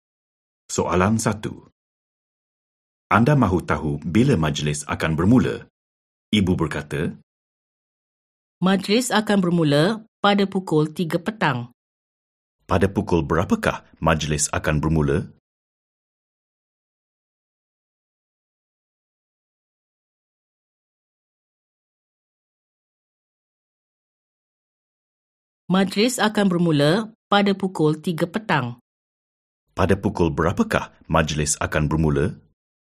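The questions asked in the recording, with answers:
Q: Pada pukul berapakah majlis akan bermula?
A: Pukul 3 petang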